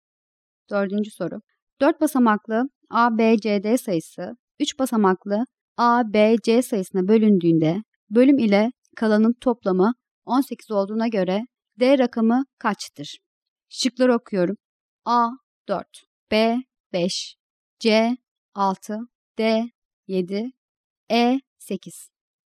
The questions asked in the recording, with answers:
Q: 4 basamaklı A, B, C, D sayısı 3 basamaklı A, B, C sayısına bölündüğünde bölüm ile kalanın toplamı 18 olduğuna göre D rakamı kaçtır?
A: Doğru cevap E şıkkı.